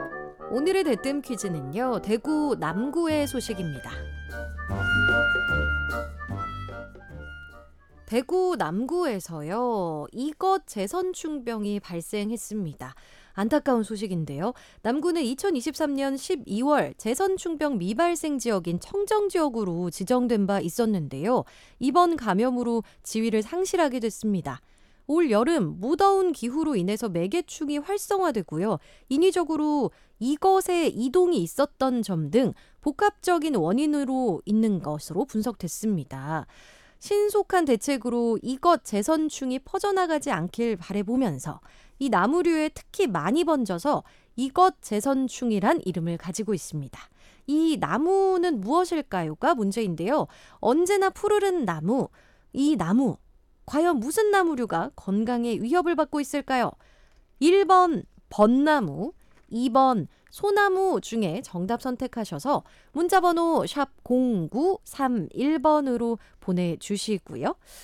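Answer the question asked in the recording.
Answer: 2번: 소나무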